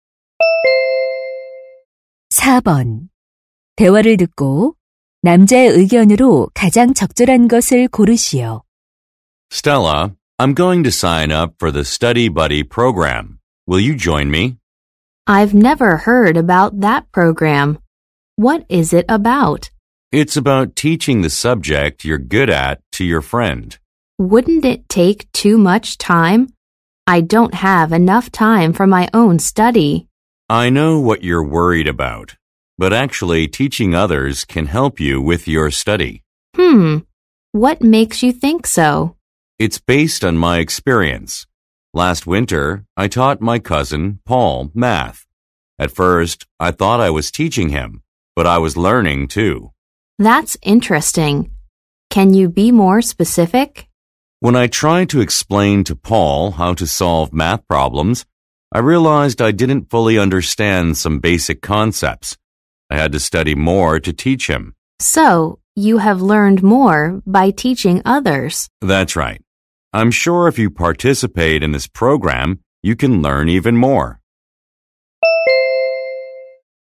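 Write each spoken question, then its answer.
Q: 대화를 듣고 남자의 의견으로 가장 적절한 것을 고르시오.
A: 다른 사람을 가르치는 것이 자신의 공부에 도움이 된다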